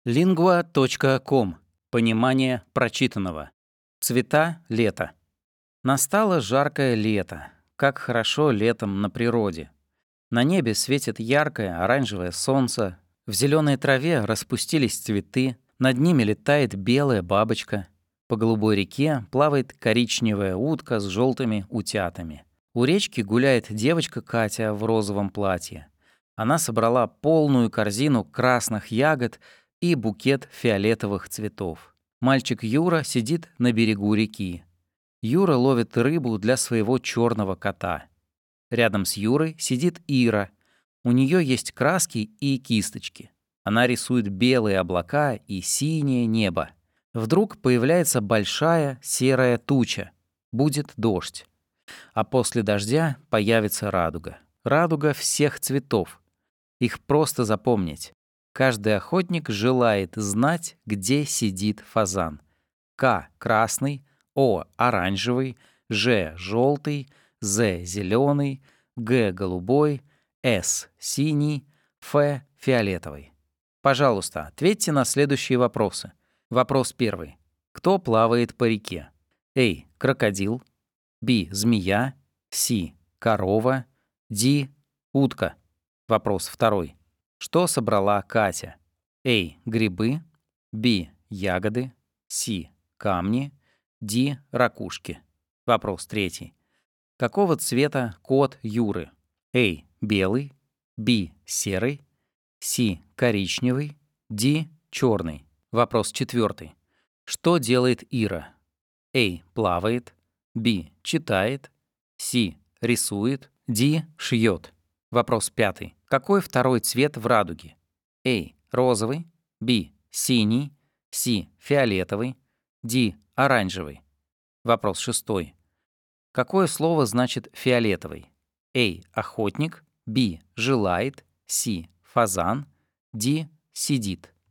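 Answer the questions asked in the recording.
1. Д: утка
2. Б: Ягоды
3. Д: Черный
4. С: Рисует
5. Д: Оранжевый
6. С: Фазан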